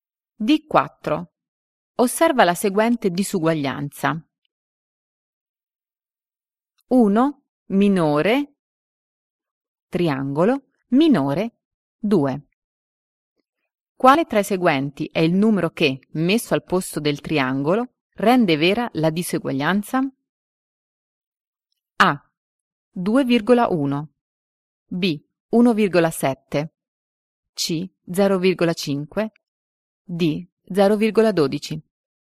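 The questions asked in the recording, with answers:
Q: Quale tra i seguenti è il numero che, messo al posto del triangolo, rende vera la diseguaglianza?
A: B: 1,7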